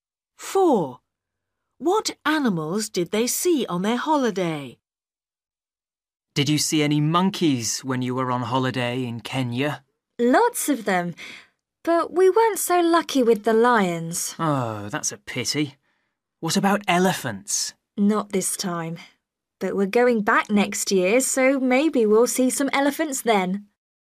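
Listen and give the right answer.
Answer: monkeys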